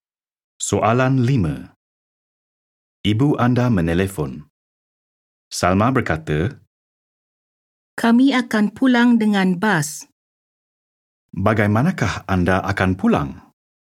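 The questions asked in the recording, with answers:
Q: Bagaimanakah anda akan pulang?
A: Dengan bas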